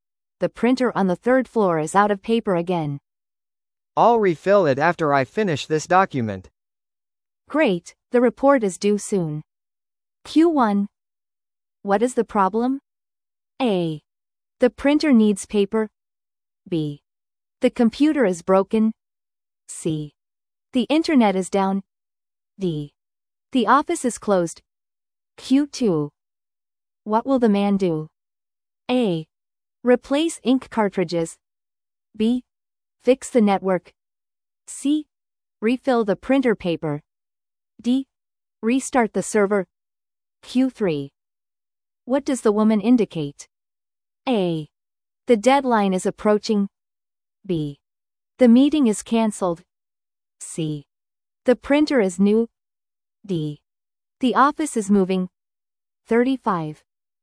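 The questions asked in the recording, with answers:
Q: What is the problem?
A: A: The printer needs paper.

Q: What will the man do?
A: C: Refill the printer paper.

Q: What does the woman indicate?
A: A: The deadline is approaching.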